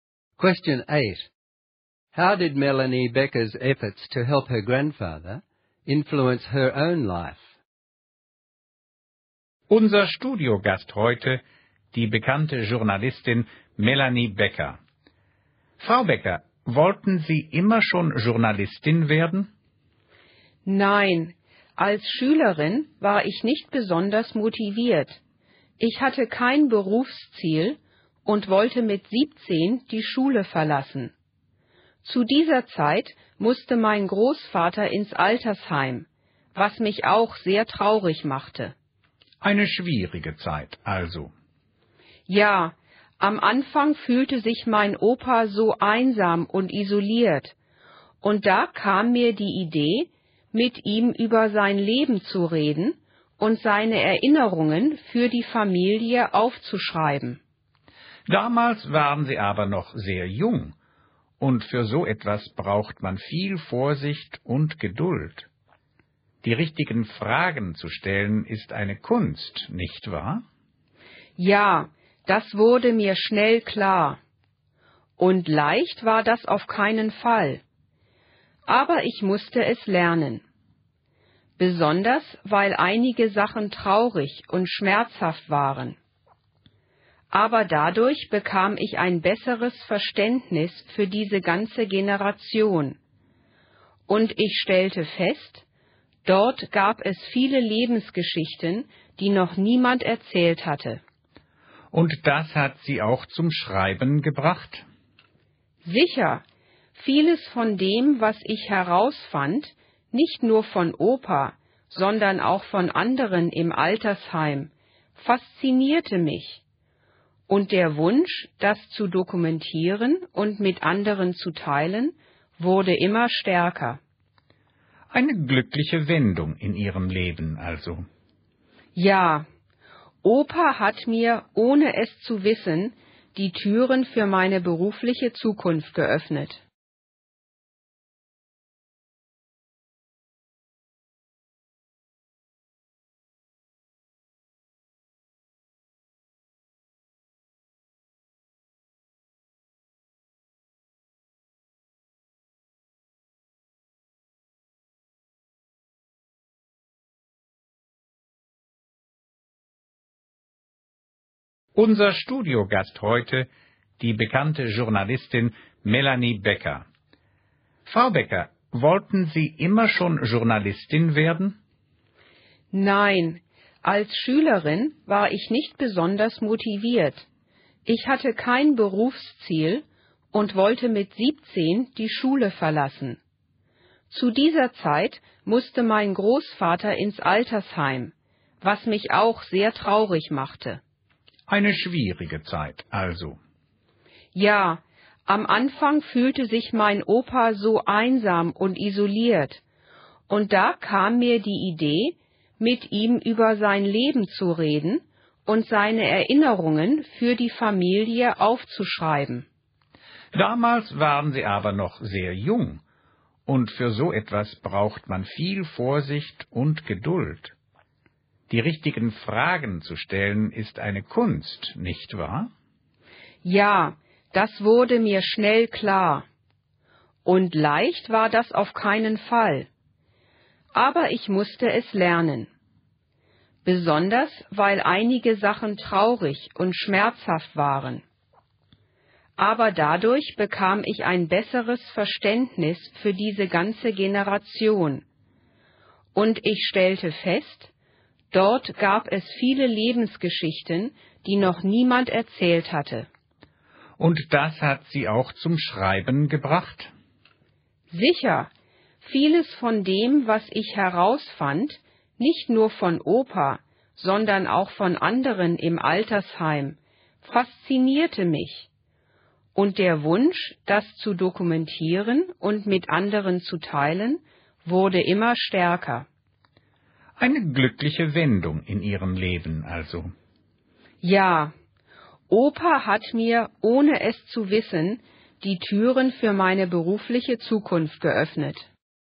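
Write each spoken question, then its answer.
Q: How did Melanie Becker's efforts to help her grandfather influence her own life?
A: Writing down his memories taught her how to interview people, helped her understand his generation and made her want to record life stories, which led to her career as a journalist.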